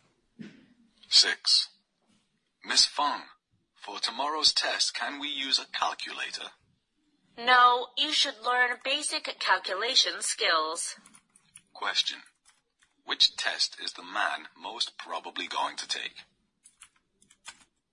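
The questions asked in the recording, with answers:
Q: Which test is the man most probably going to take?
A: A math test.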